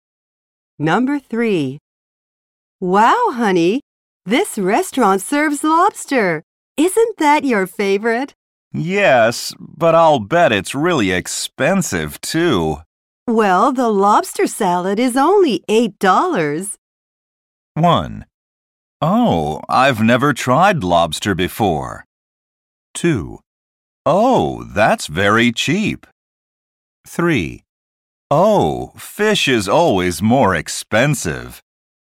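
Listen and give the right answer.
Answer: 2: Oh, that's very cheap.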